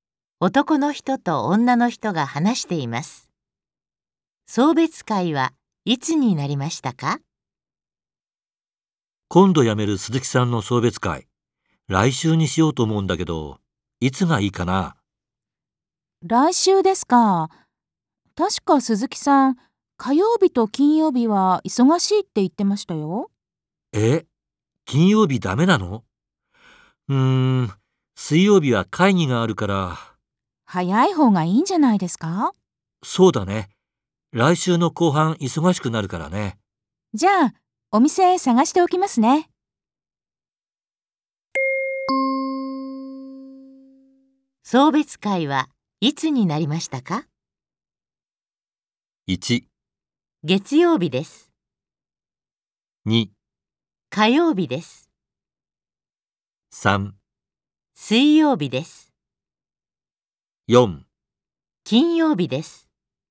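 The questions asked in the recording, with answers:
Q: 送別会はいつになりましたか?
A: 1: 月曜日です。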